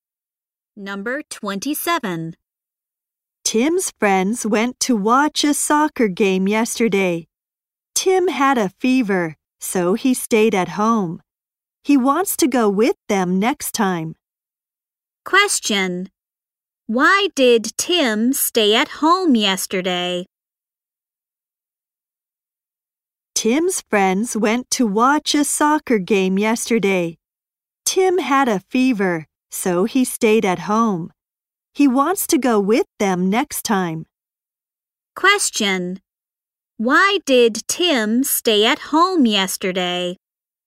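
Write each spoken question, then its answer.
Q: Question. Why did Tim stay at home yesterday?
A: He had a fever.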